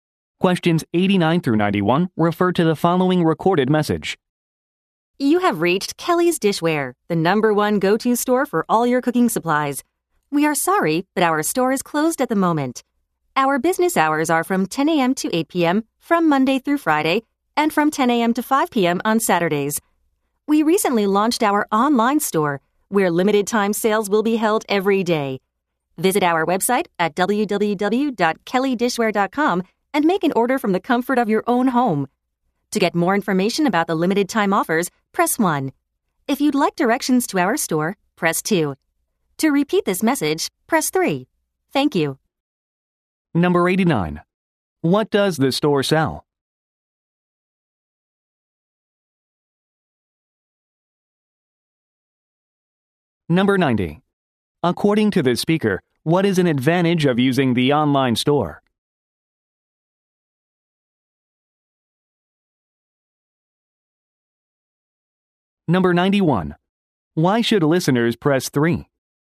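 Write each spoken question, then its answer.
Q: What does the store sell?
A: Cooking supplies and dishware

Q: Why should listeners press 3?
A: To hear the message again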